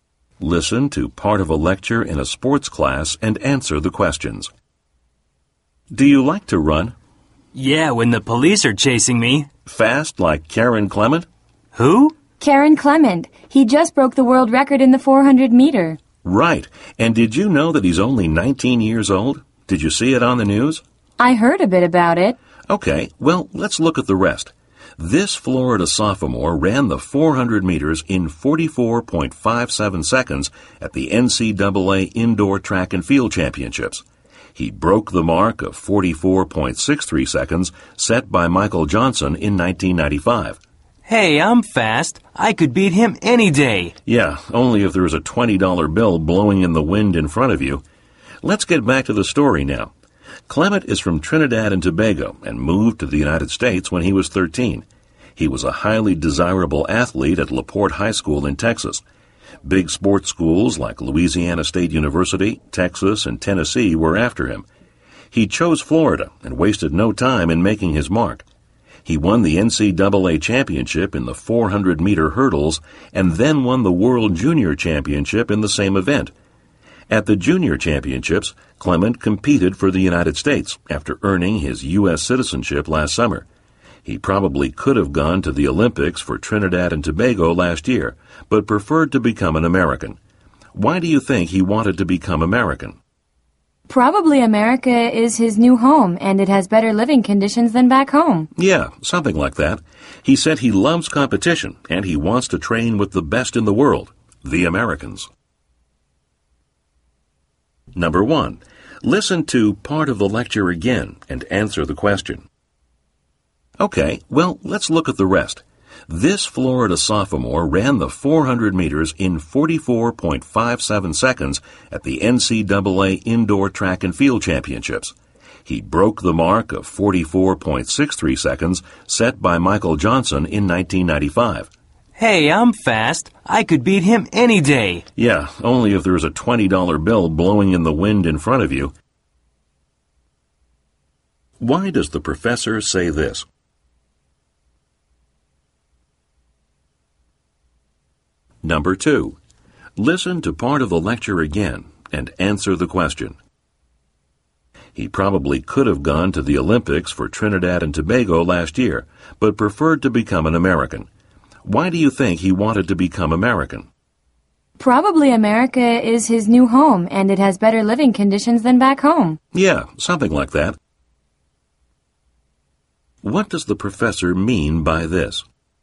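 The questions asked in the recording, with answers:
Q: Why does the professor say this?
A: To joke that the student would only run fast if there were money to chase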